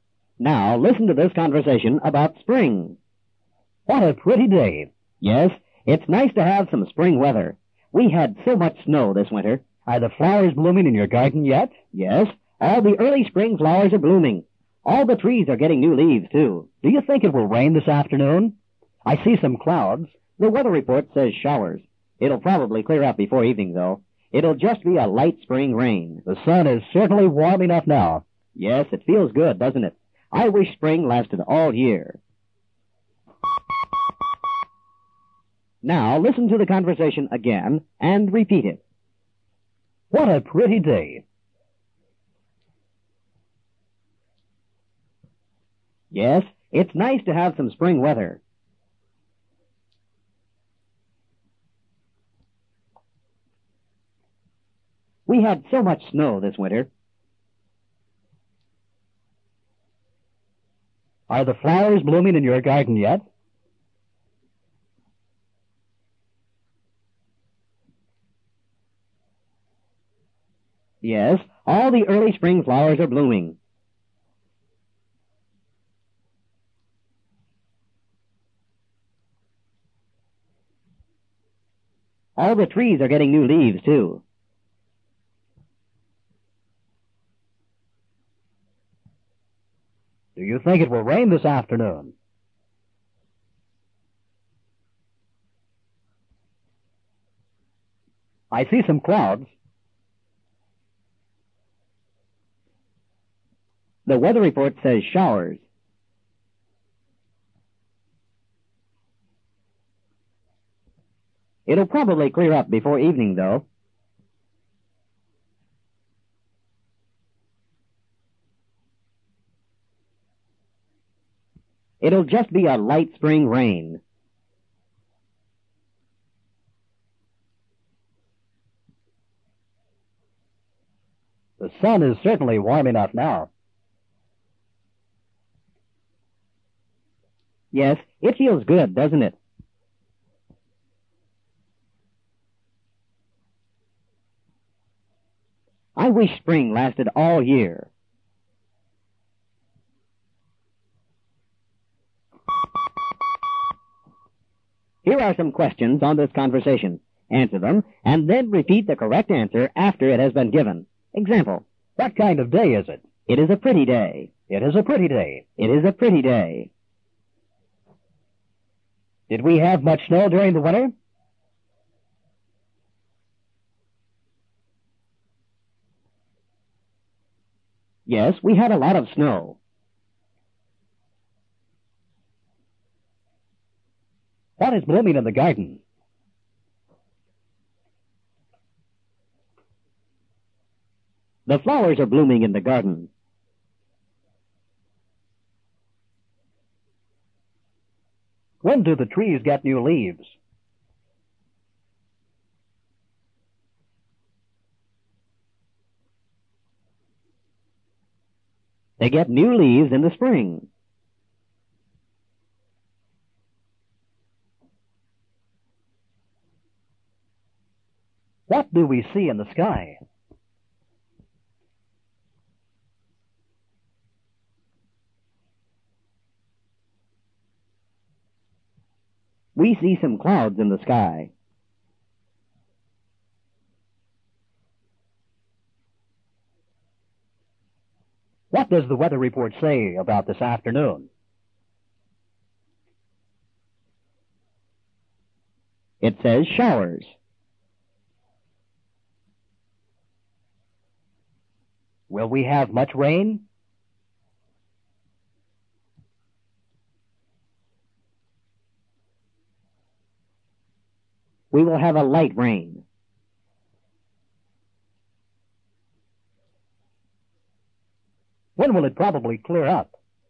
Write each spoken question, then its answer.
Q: Did we have much snow during the winter?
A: Yes, we had a lot of snow.

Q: What is blooming in the garden?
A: The flowers are blooming in the garden.

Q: When do the trees get new leaves?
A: They get new leaves in the spring.

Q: What do we see in the sky?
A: We see some clouds in the sky.

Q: What does the weather report say about this afternoon?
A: It says showers.

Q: Will we have much rain?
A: we will have a light rain.

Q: When will it probably clear up?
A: It will probably clear up before evening.